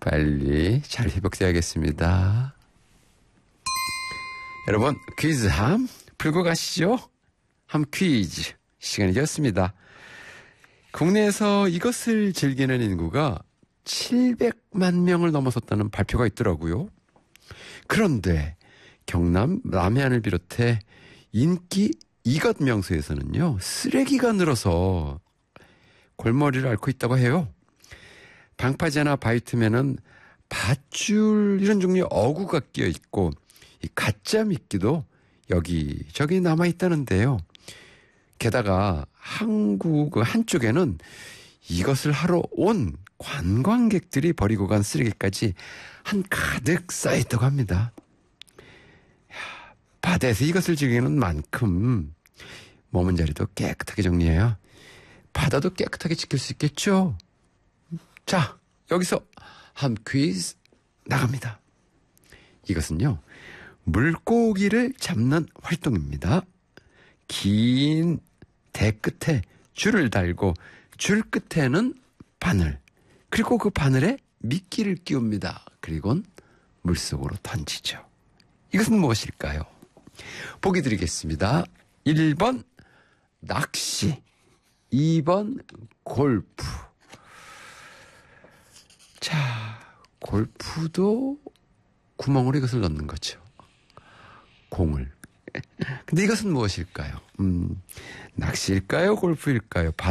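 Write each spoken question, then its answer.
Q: 근데 이것은 무엇일까요? 낚시일까요? 골프일까요?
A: 1: 낚시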